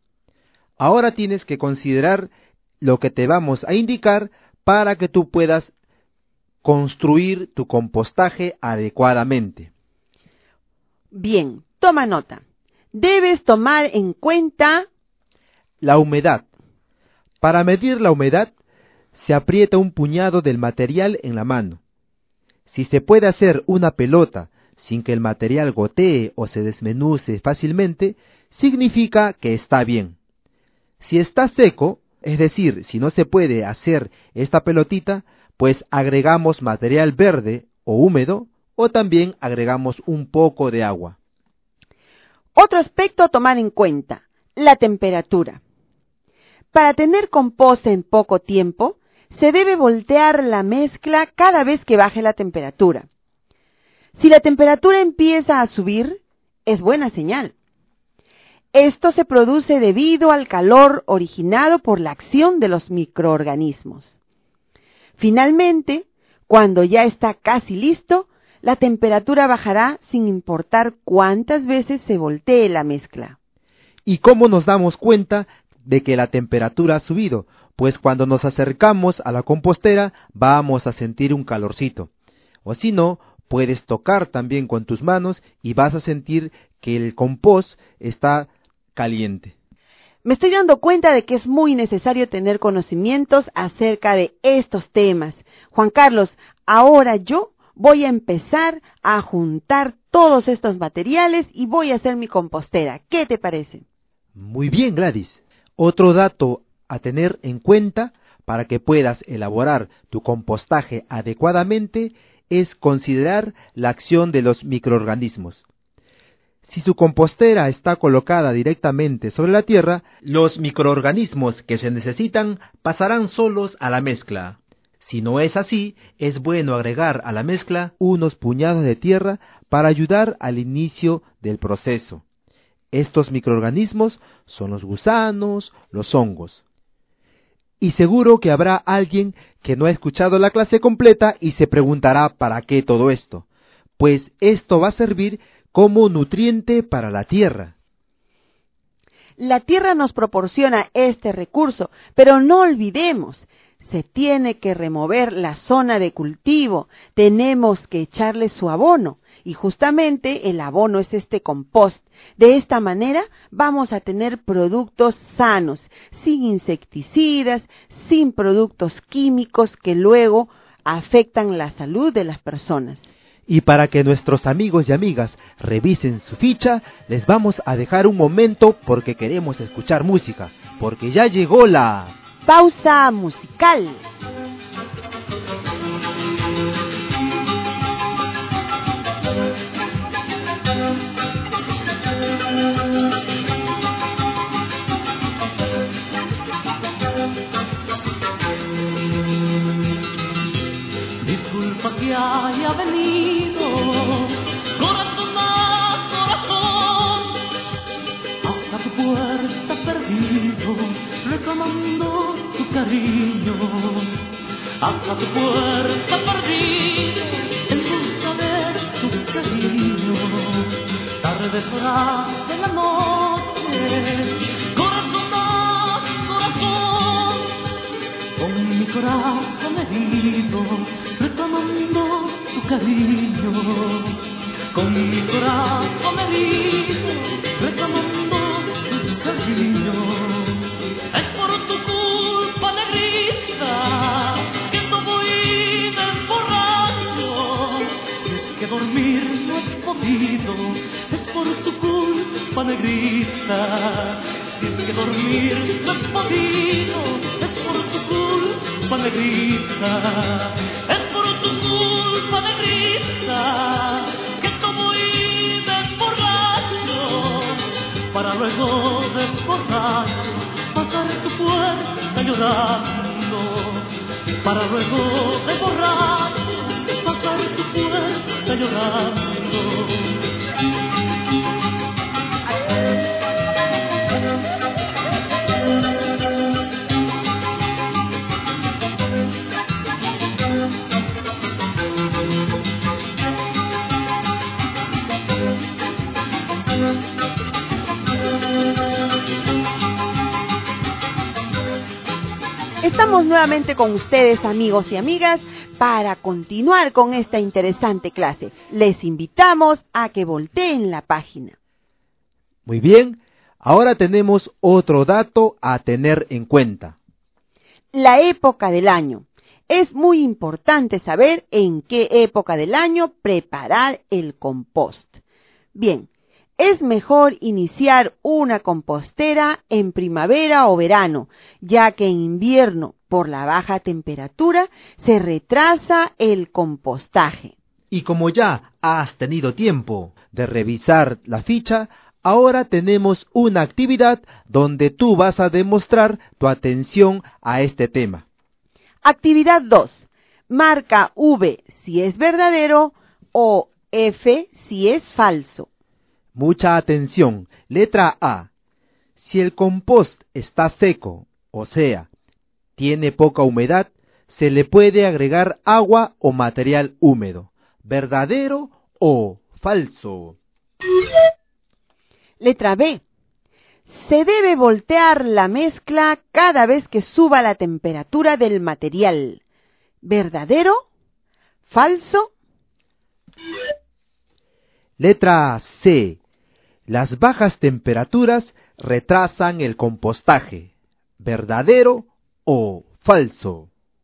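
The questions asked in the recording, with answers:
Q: Letra A. Si el compost está seco, o sea, tiene poca humedad, se le puede agregar agua o material húmedo.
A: Verdadero

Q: Letra B. Se debe voltear la mezcla cada vez que suba la temperatura del material.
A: Falso

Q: Letra C. Las bajas temperaturas retrasan el compostaje.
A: Verdadero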